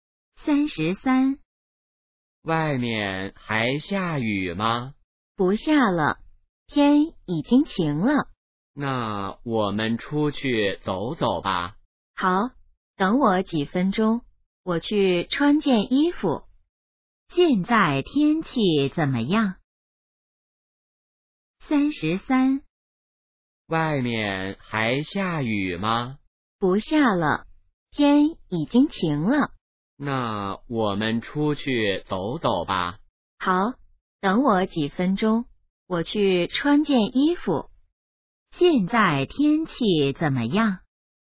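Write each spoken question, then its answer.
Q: 现在天气怎么样?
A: 晴了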